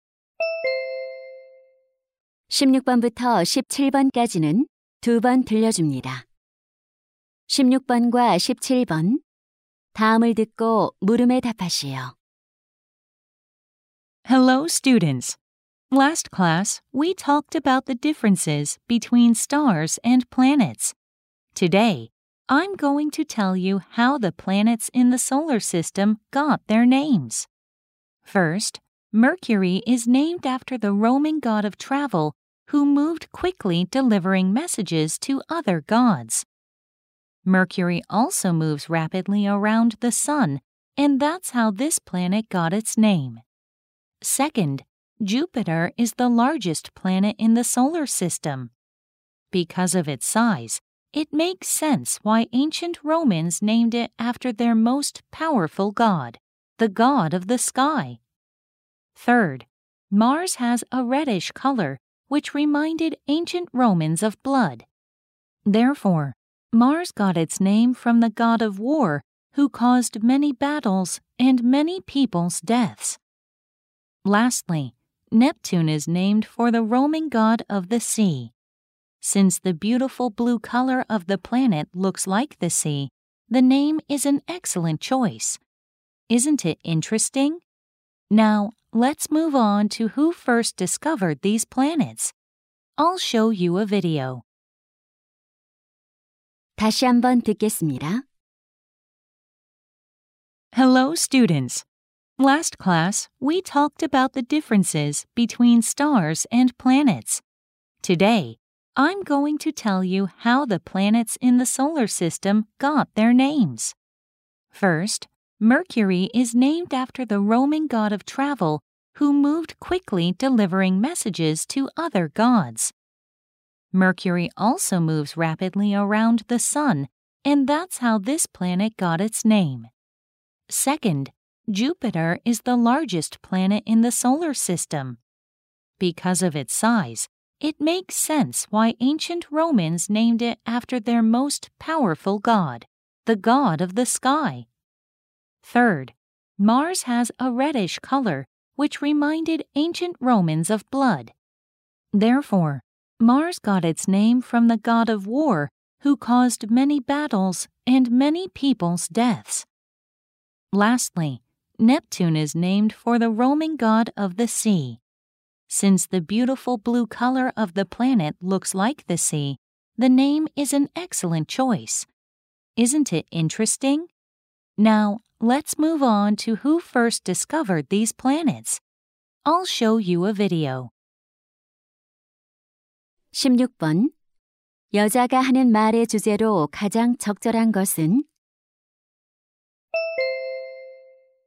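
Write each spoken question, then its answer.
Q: 여자가 하는 말의 주제로 가장 적절한 것은?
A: 태양계 행성들의 이름이 붙여진 유래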